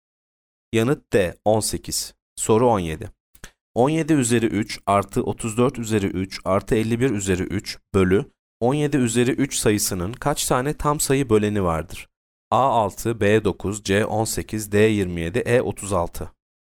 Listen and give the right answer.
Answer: Yanıt C 18.